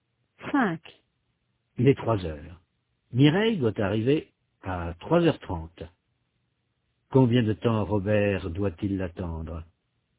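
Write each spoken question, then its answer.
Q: Combien de temps Robert doit-il l'attendre?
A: Une demi-heure (30 minutes)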